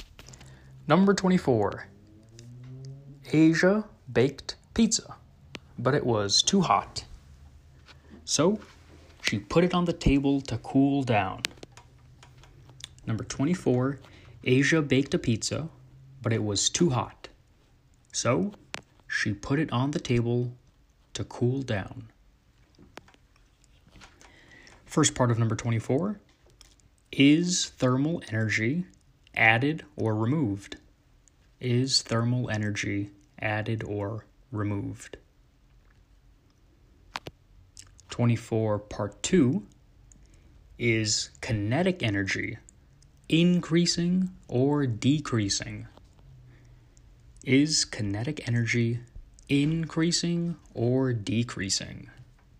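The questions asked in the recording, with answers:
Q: is thermal energy added or removed?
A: removed

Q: is kinetic energy increasing or decreasing?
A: decreasing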